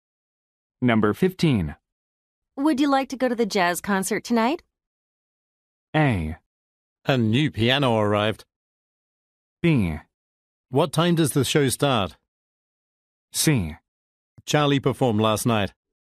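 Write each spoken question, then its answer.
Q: Would you like to go to the jazz concert tonight?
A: B: What time does the show start?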